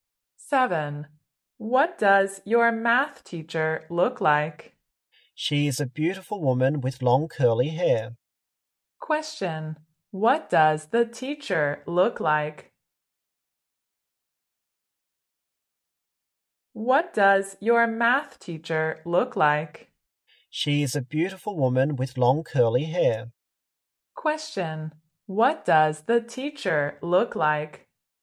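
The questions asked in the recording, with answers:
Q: What does the teacher look like?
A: A beautiful woman with long curly hair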